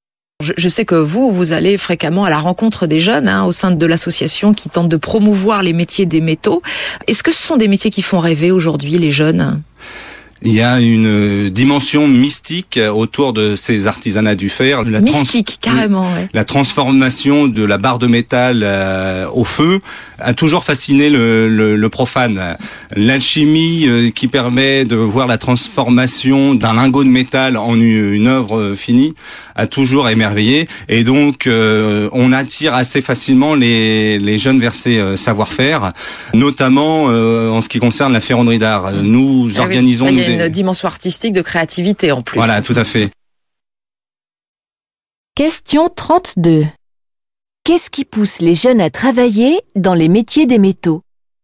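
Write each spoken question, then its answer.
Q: Qu'est-ce qui pousse les jeunes à travailler dans les métiers des métaux ?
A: La fascination pour la transformation du métal et la dimension artistique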